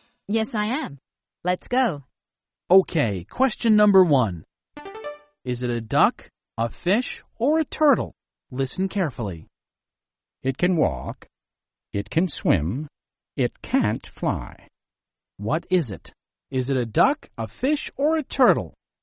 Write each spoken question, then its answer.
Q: What is it? Is it a duck, a fish, or a turtle?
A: It's a turtle. A turtle can walk and swim, but it can't fly.